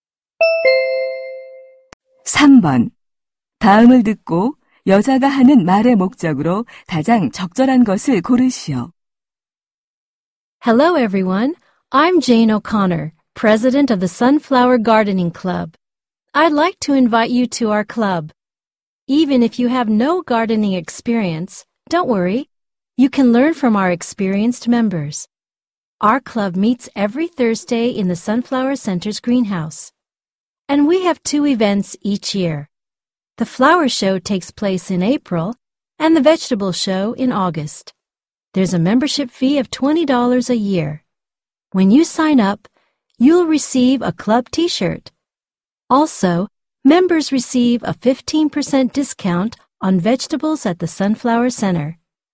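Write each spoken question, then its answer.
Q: 다음을 듣고 여자가 하는 말의 목적으로 가장 적절한 것을 고르시오.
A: 원예 동아리 가입을 권유하려고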